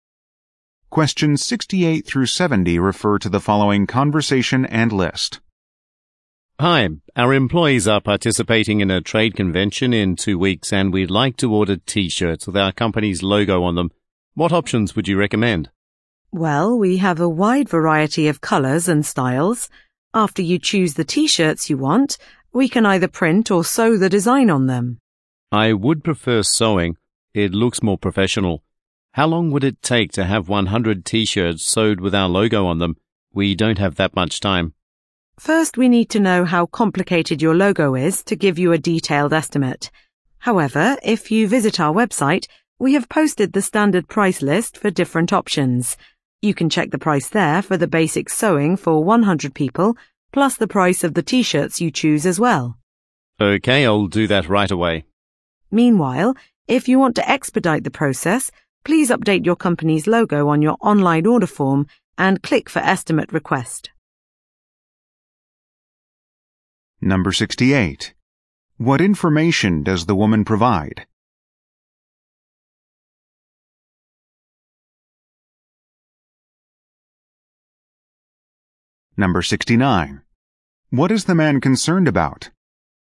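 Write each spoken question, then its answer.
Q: What is the man concerned about?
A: How long the order will take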